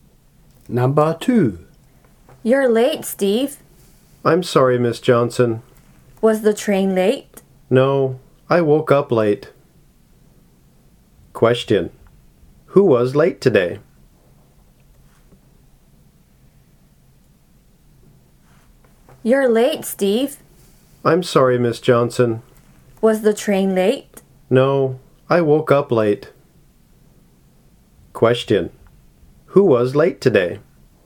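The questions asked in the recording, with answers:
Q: Who was late today?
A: Steve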